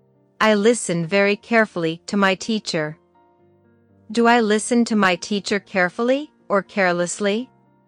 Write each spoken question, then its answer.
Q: Do I listen to my teacher carefully or carelessly?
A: Carefully. I listen to my teacher very carefully.